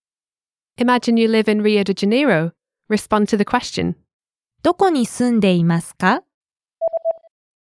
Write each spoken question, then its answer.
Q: どこに住んでいますか?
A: リオデジャネイロに住んでいます。